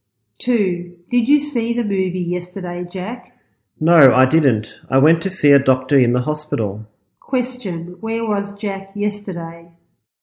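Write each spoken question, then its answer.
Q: Question, where was Jack yesterday?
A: In the hospital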